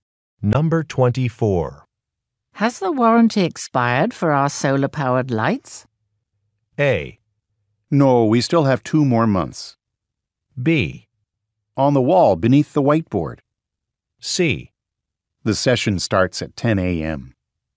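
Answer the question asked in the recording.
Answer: A: No, we still have 2 more months.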